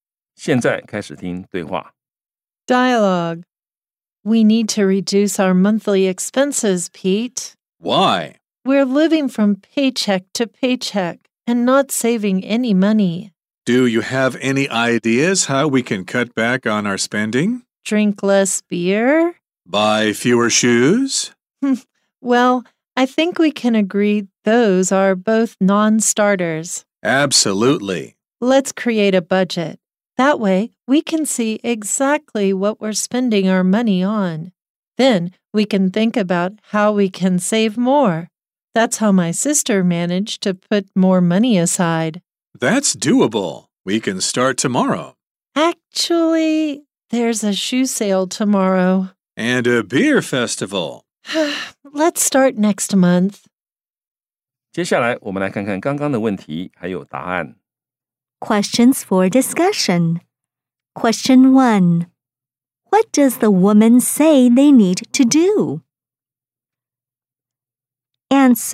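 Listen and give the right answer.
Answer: Reduce their monthly expenses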